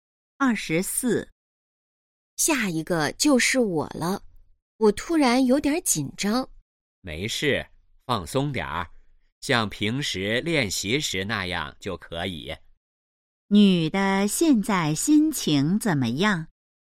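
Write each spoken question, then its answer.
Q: 女的现在心情怎么样?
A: 紧张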